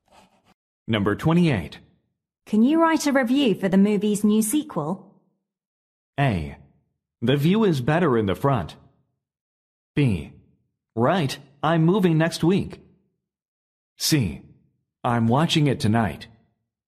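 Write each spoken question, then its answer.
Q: Can you write a review for the movie's new sequel?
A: C: I'm watching it tonight.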